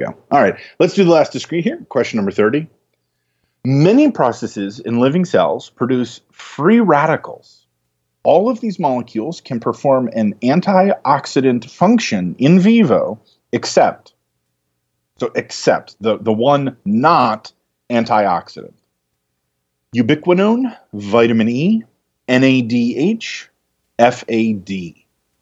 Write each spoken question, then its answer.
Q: All of these molecules can perform an antioxidant function in vivo, except the one not antioxidant.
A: So in this case, the right answer is FAD